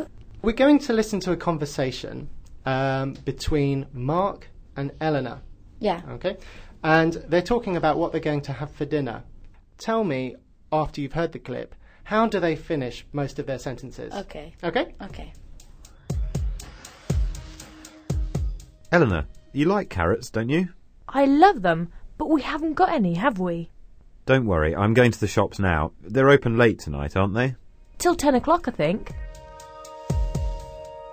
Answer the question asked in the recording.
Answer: Mark and Eleanor asked a short question at the end of most of their sentences.